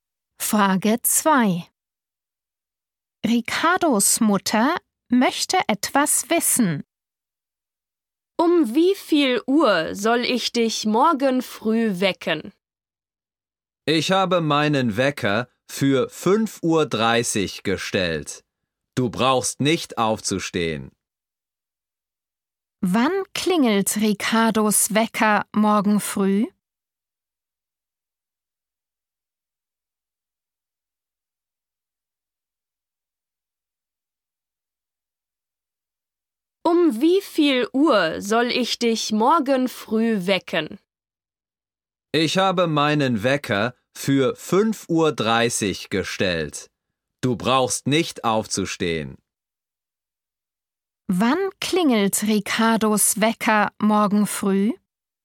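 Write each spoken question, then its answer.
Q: Wann klingelt Ricardos Wecker morgen früh?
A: um 5.30 Uhr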